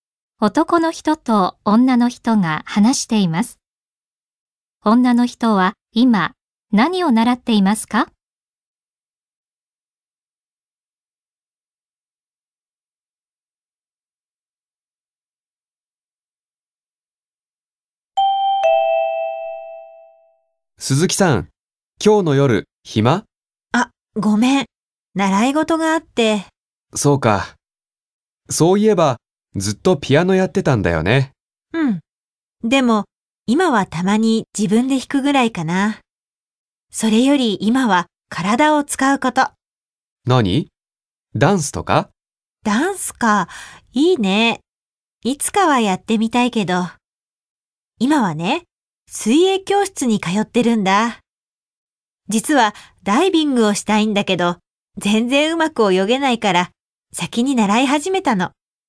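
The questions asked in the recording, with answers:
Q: 女の人は今何を習っていますか?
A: 水泳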